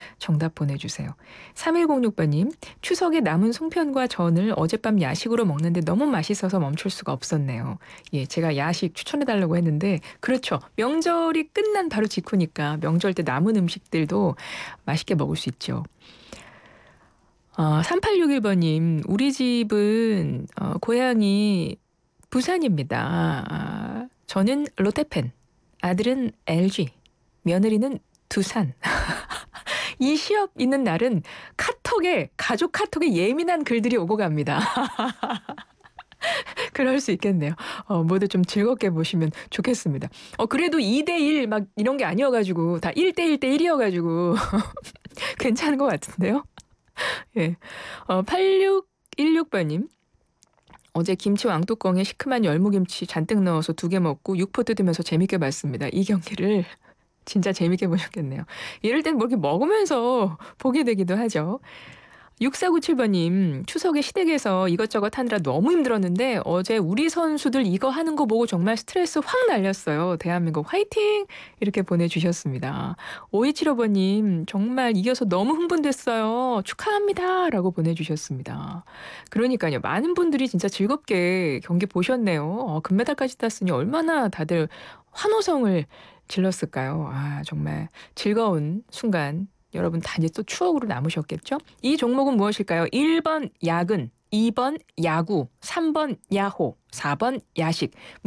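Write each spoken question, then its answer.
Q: 이 종목은 무엇일까요? 1번 야근, 2번 야구, 3번 야호, 4번 야식.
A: 2: 야구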